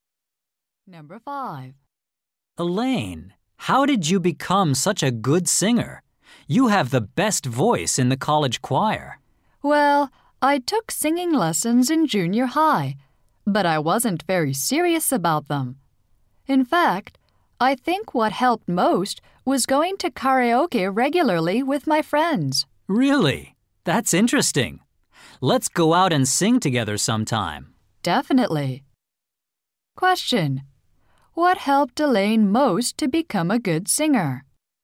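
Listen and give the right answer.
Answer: Going to karaoke regularly with friends.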